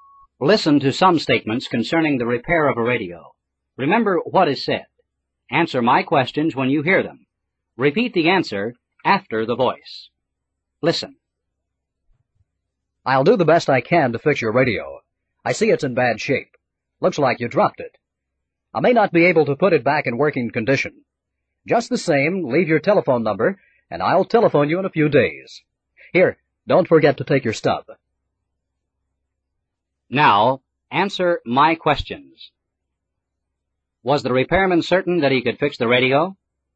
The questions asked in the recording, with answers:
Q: Was the repairman certain that he could fix the radio?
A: No, he wasn't.